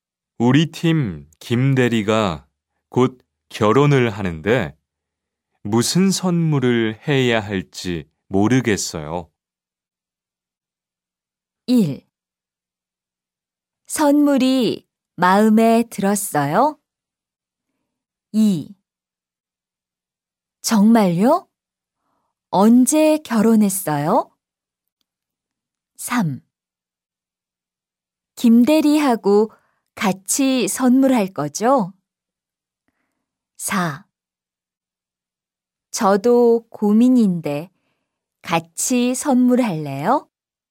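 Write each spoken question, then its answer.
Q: 우리 팀 김대리가 곧 결혼을 하는데 무슨 선물을 해야 할지 모르겠어요.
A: 4: 저도 고민인데 같이 선물할래요?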